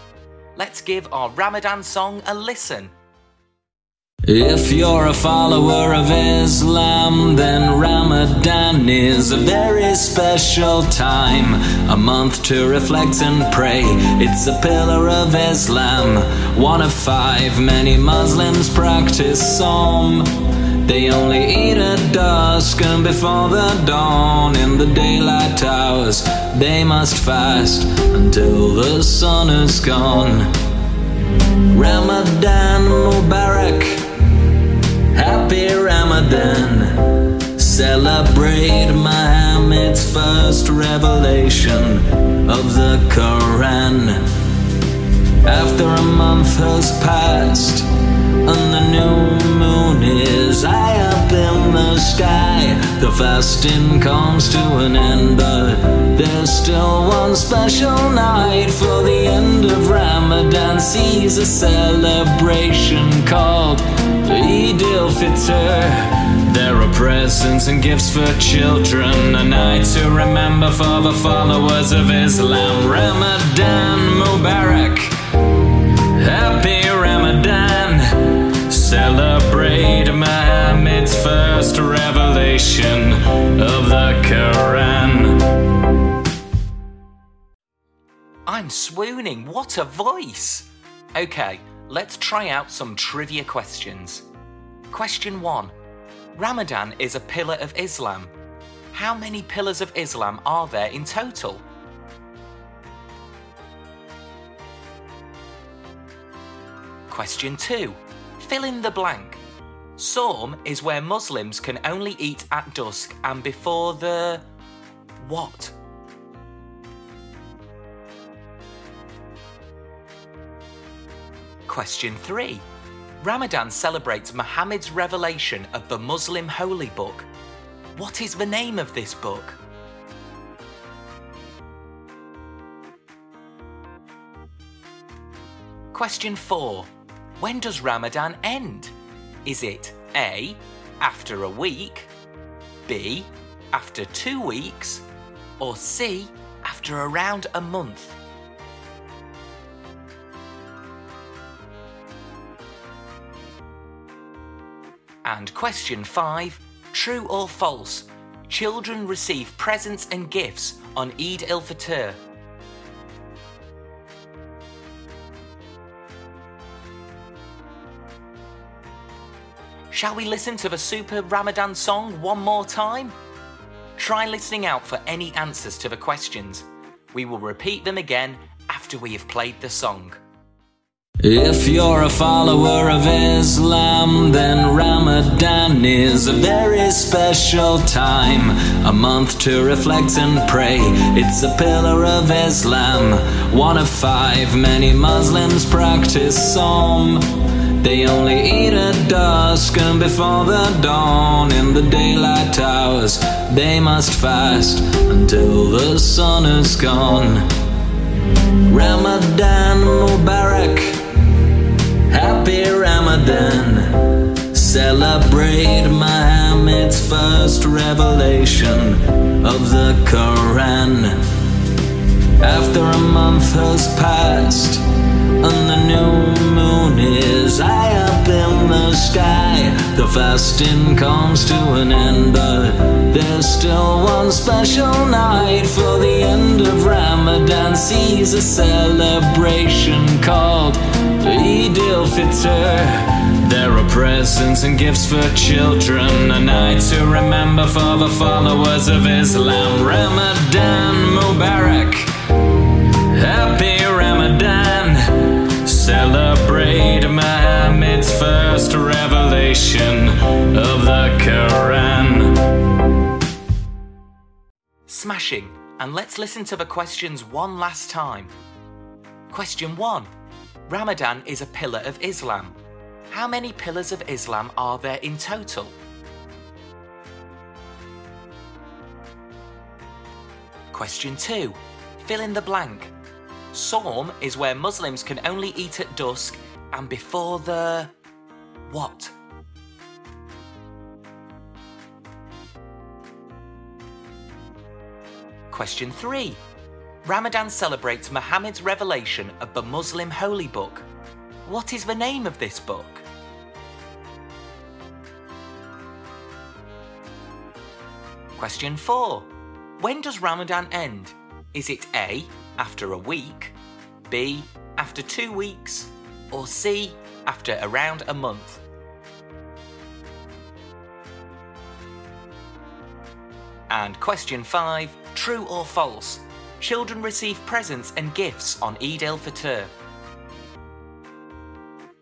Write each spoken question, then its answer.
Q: Ramadan is a pillar of Islam. How many pillars of Islam are there in total?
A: The answer is 5.

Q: Sawm is where Muslims can only eat at dusk and before the... what?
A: Sawm is where Muslims can only eat at dusk and before the dawn.

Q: Ramadan celebrates Muhammad's revelation of the Muslim holy book. What is the name of this book?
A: Well, Ramadan celebrates the revelation of the Quran, the Muslim holy book.

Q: When does Ramadan end? Is it A, after a week, B, after 2 weeks, or C, after around a month?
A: So the answer is C.

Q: True or false? Children receive presents and gifts on Eid al-Fitr.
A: The answer is true.